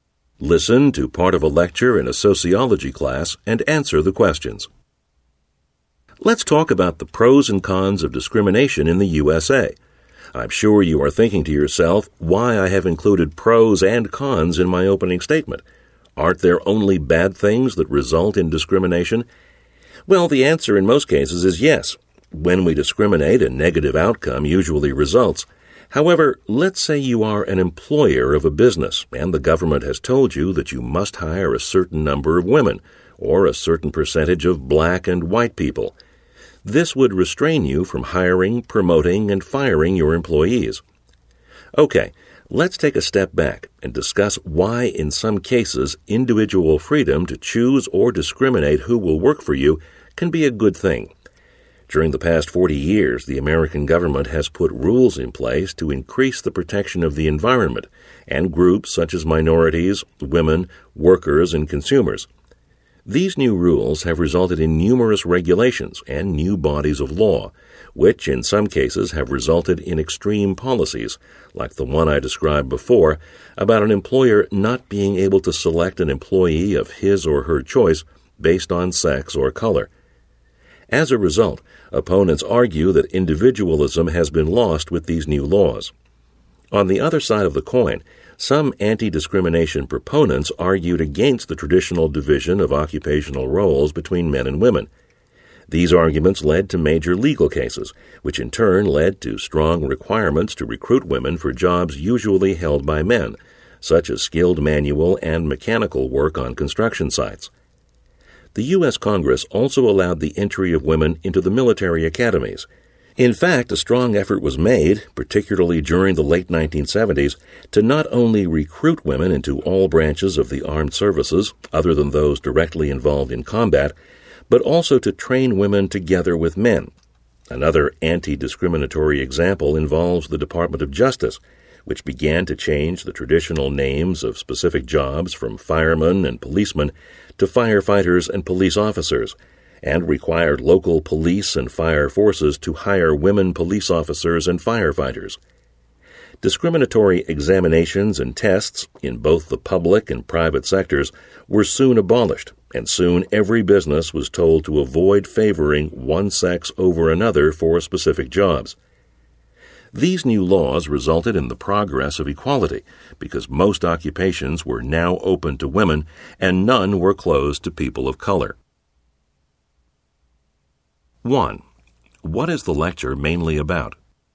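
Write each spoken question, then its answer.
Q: What is the lecture mainly about?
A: The pros and cons of discrimination and anti-discrimination laws in the USA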